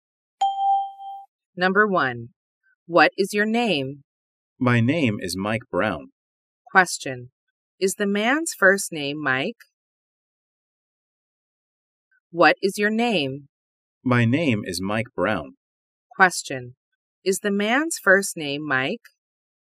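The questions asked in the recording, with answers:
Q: Is the man's first name Mike?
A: Yes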